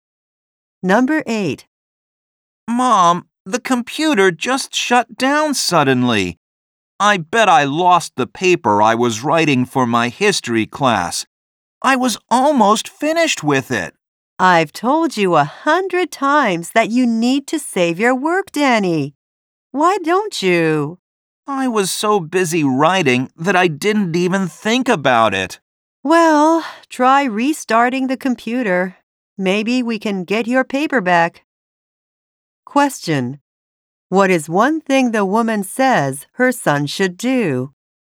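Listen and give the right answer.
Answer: Save his work (and try restarting the computer).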